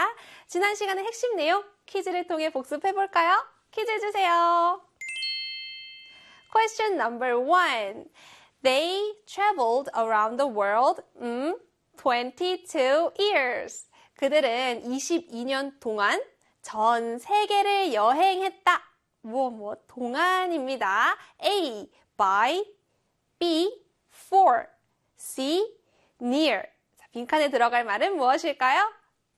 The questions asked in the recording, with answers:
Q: 자, 빈칸에 들어갈 말은 무엇일까요?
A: 네, 바로 B의 for이죠.